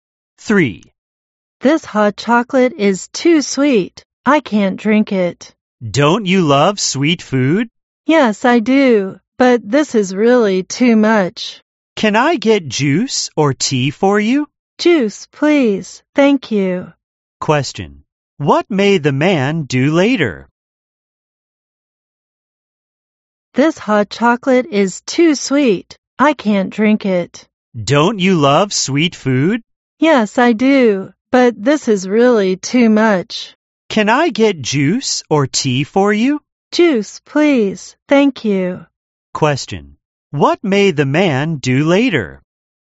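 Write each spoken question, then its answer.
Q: What may the man do later?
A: Drink juice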